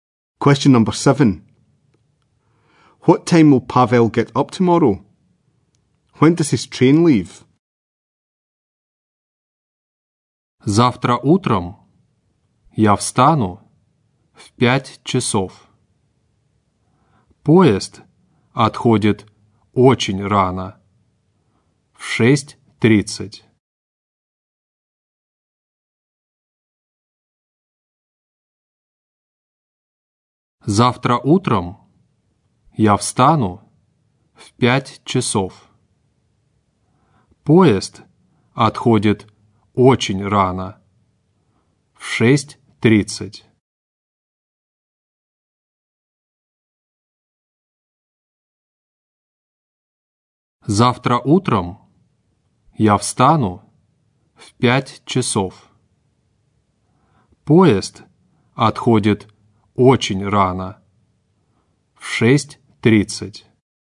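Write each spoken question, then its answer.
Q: What time will Pavel get up tomorrow?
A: At 5 o'clock

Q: When does his train leave?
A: At 6:30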